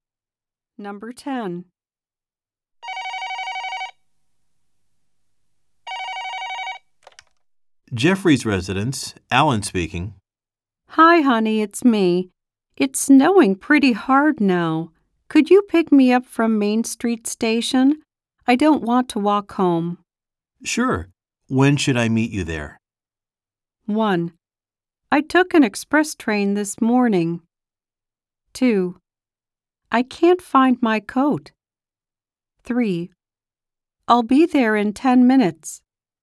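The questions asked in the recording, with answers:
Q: Sure. When should I meet you there?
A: 3: I'll be there in 10 minutes.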